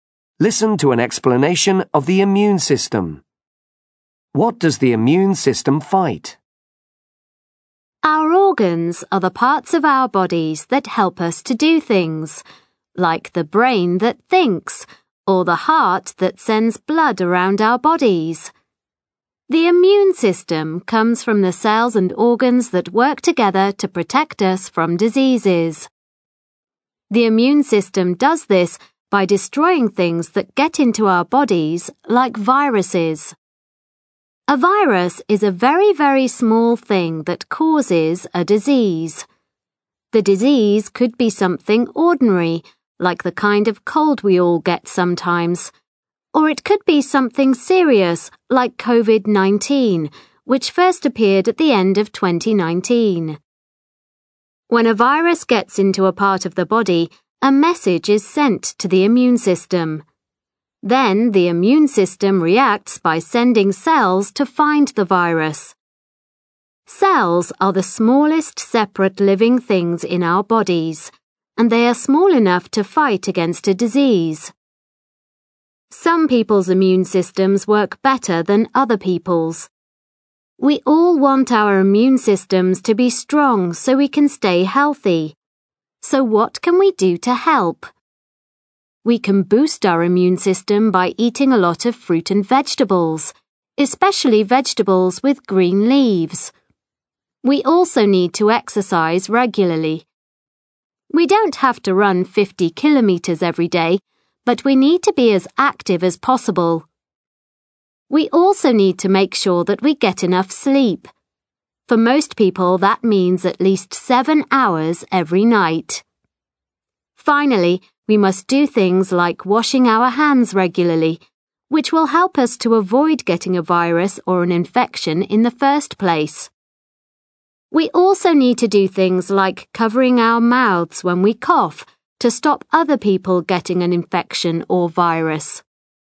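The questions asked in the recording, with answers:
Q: What does the immune system fight?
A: Diseases, by destroying things like viruses that get into our bodies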